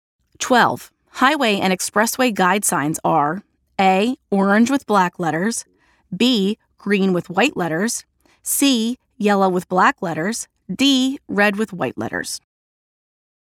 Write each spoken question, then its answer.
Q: Highway and expressway guide signs are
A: The answer is letter B.